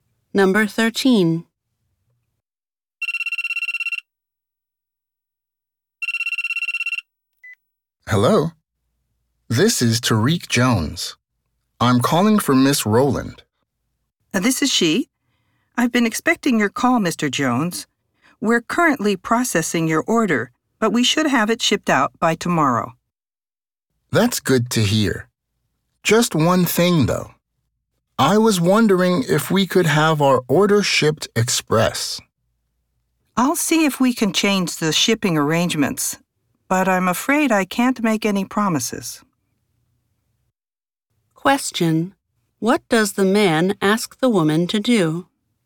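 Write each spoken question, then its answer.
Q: What does the man ask the woman to do?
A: Ship his order by express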